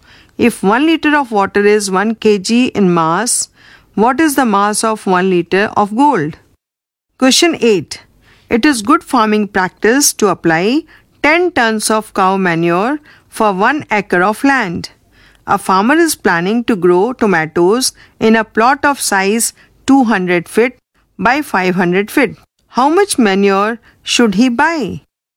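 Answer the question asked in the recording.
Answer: About 23 tons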